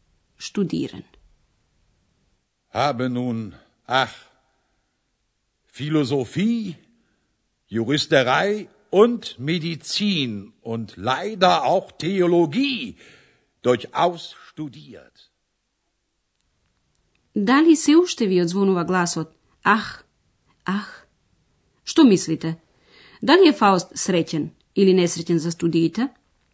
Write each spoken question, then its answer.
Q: Дали е Фауст среќен или несреќен за студиите?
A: Да, тој е несреќен